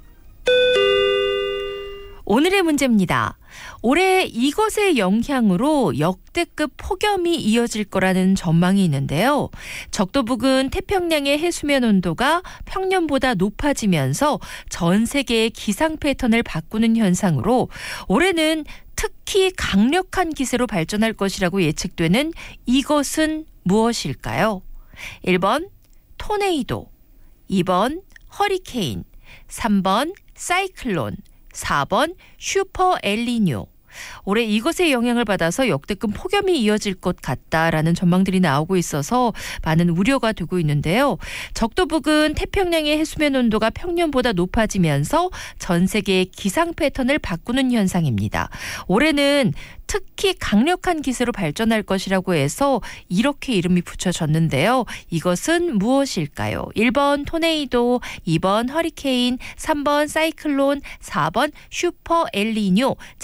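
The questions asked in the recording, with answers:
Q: 적도 부근 태평양의 해수면 온도가 평년보다 높아지면서 전 세계의 기상 패턴을 바꾸는 현상으로 올해는 특히 강력한 기세로 발전할 것이라고 예측되는 이것은 무엇일까요?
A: 4번: 슈퍼 엘니뇨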